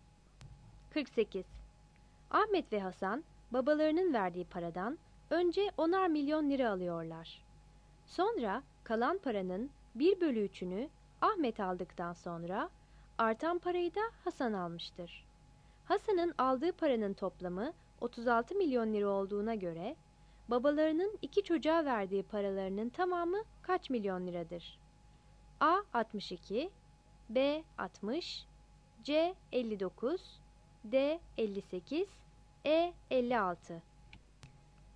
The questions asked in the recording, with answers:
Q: Hasan'ın aldığı paranın toplamı 36 milyon lira olduğuna göre babalarının iki çocuğa verdiği paralarının tamamı kaç milyon liradır?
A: 48 C